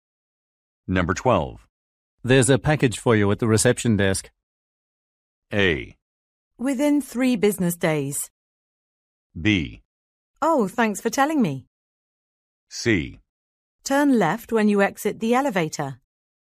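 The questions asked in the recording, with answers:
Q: There's a package for you at the reception desk.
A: B: Oh, thanks for telling me.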